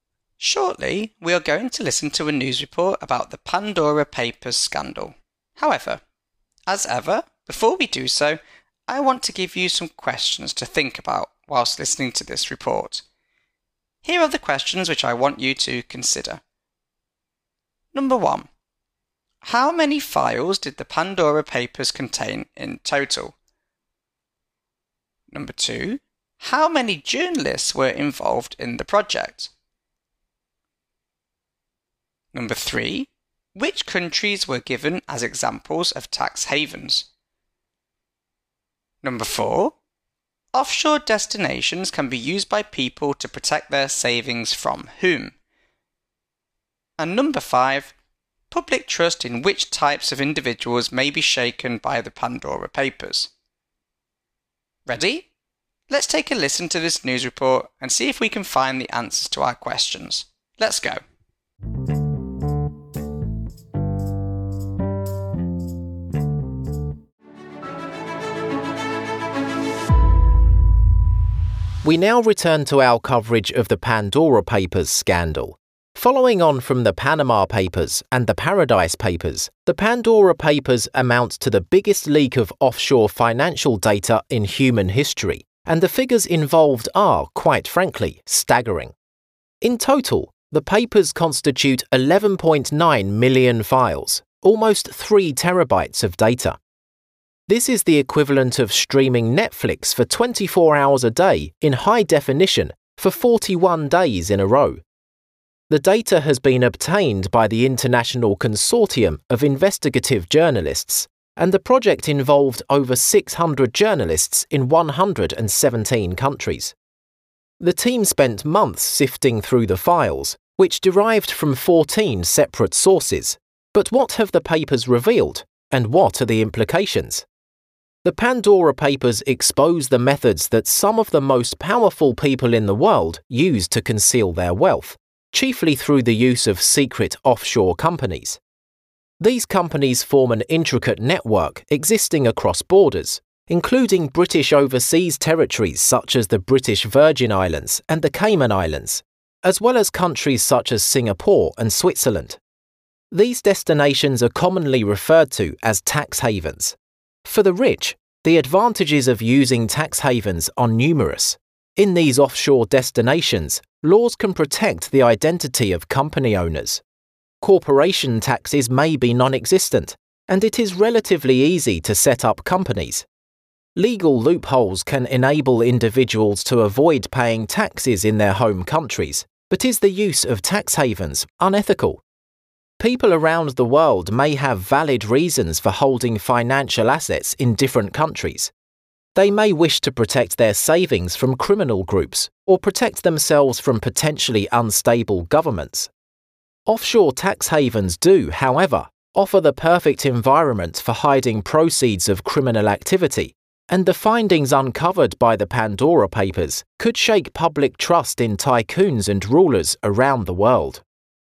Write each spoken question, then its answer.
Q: How many files did the Pandora Papers contain in total?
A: As we heard, the Pandora Papers contained a whopping 11.9 million files, which is equivalent to 3 terabytes of data.

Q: How many journalists were involved in the project?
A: As we heard in the report, a total of 600 investigative journalists representing the International Consortium of Investigative Journalists were involved in the project.

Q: Which countries were given as examples of tax havens?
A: In the report, the newsreader referred to the British Virgin Islands, the Cayman Islands, as well as countries such as Singapore and Switzerland, as all being examples of tax havens.

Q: Offshore destinations can be used by people to protect their savings from whom?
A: As we heard in the report, offshore destinations can be used by people to protect their savings from criminal groups or potentially unstable governments.

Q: Public trust in which types of individuals may be shaken by the Pandora Papers.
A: As we heard, public trust in tycoons is likely to be shaken as a result of these papers.